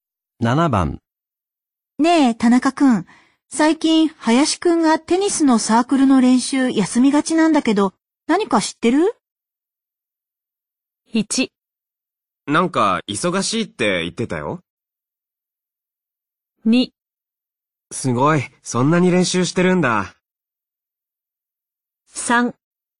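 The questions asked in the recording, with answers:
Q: ねえ、田中くん。最近、林くんがテニスのサークルの練習休みがちなんだけど、何か知ってる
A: 1: なんか、忙しいって言ってたよ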